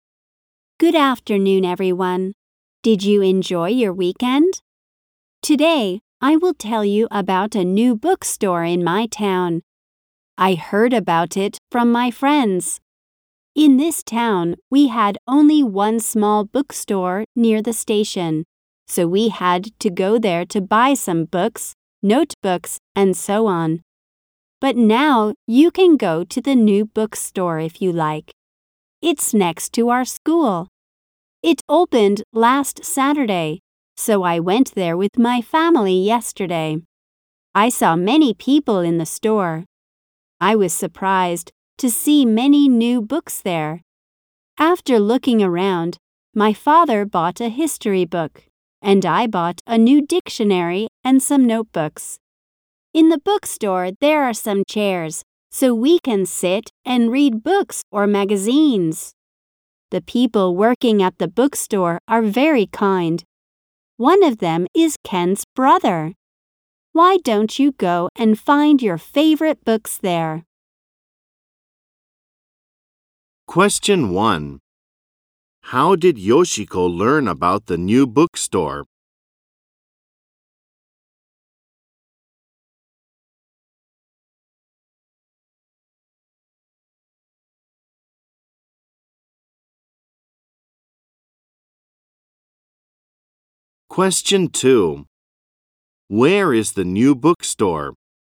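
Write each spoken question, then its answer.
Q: How did Yoshiko learn about the new bookstore?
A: She heard about it from her friends.

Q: Where is the new bookstore?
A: It's next to her school.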